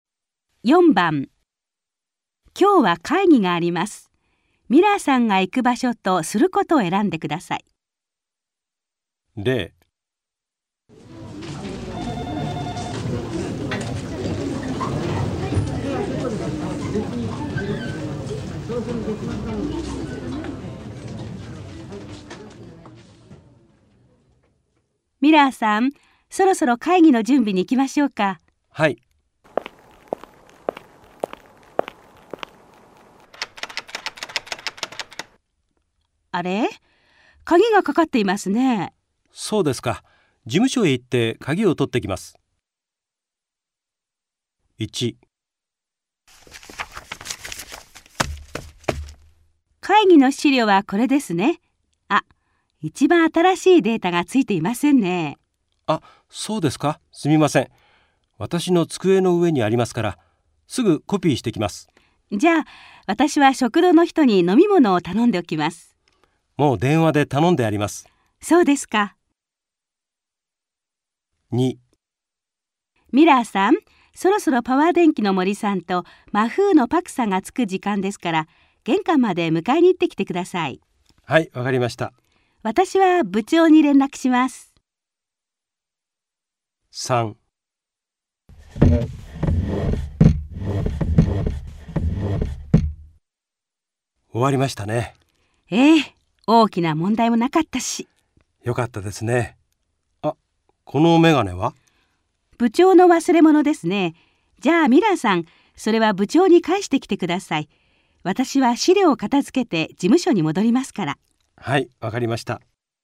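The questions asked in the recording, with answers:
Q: ミラーさんが行く場所とすることを選んでください。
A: 自分の机へ行って、最新のデータをコピーする

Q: ミラーさんが行く場所とすることを選んでください。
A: 玄関へ行って、森さんとパクさんを迎える

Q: ミラーさんが行く場所とすることを選んでください。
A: 部長のところへ行って、メガネを返す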